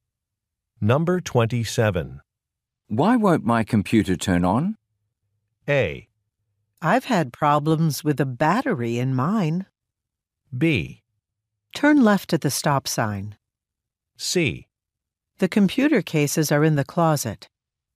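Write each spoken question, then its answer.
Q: Why won't my computer turn on?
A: A: I've had problems with a battery in mine.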